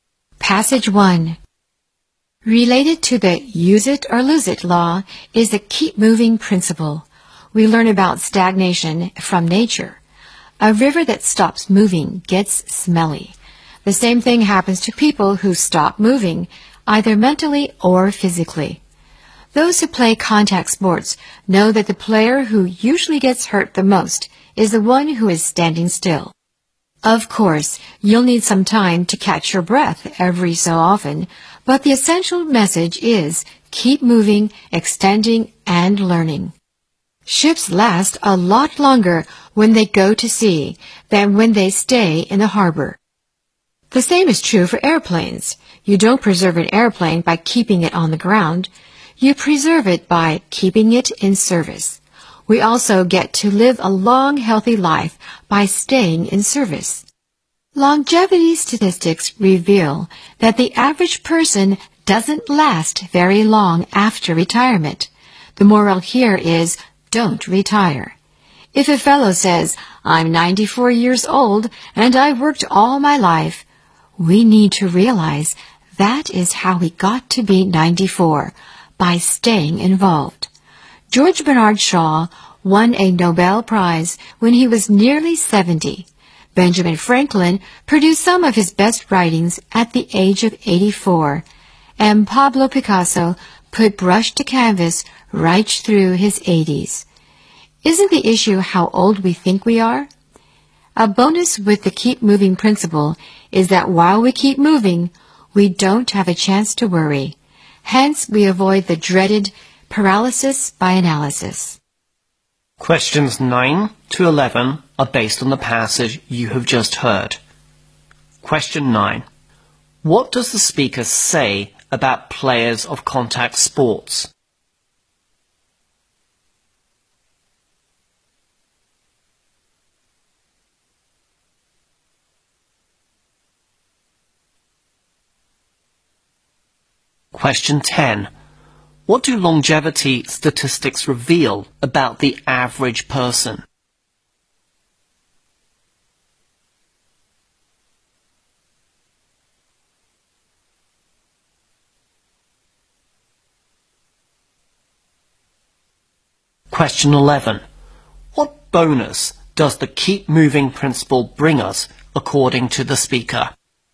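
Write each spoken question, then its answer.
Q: What does the speaker say about players of contact sports?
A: The one standing still usually gets hurt the most

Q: What do longevity statistics reveal about the average person?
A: They don't last very long after retirement

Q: What bonus does the keep moving principle bring us, according to the speaker?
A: We don't have a chance to worry, avoiding paralysis by analysis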